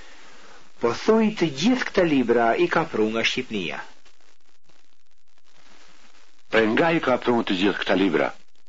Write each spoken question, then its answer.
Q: Pre nga i ka prunë të gjithë këta libra?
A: Të gjithë këta libra i ka prunë nga Shqipnia.